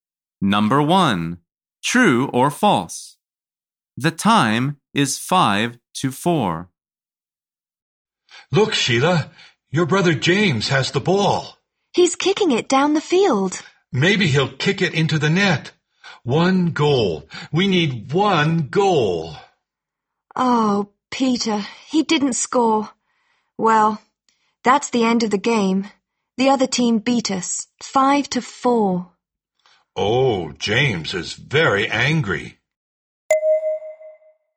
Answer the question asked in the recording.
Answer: The answer is false. The score is five to four.